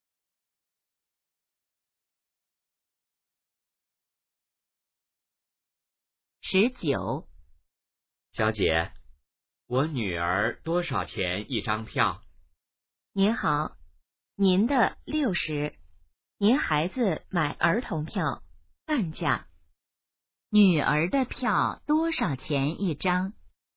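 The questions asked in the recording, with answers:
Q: 女儿的票多少钱一张?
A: 30元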